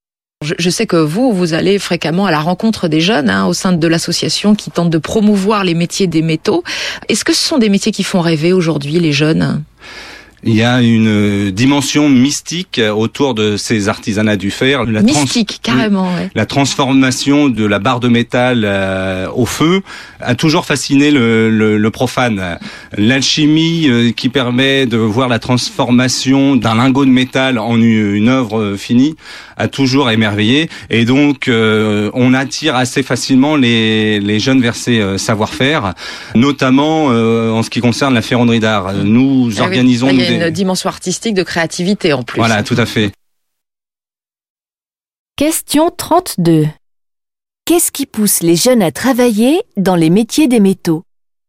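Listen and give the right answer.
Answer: La fascination pour la transformation du métal au feu, une dimension mystique et artistique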